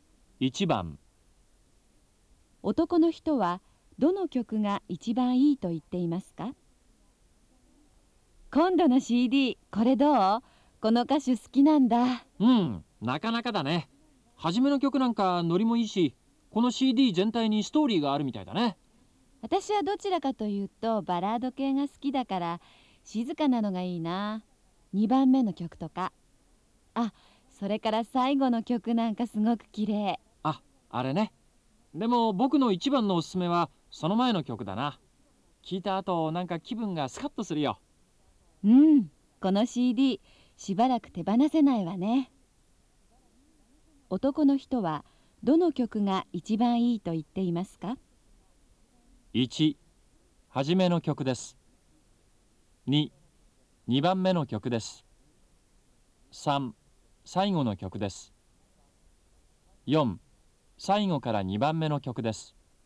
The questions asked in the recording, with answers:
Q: 男の人はどの曲が一番いいと言っていますか?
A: 1番、4